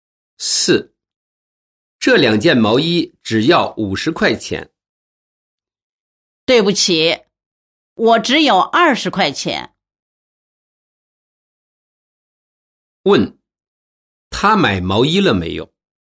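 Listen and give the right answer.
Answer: 没有买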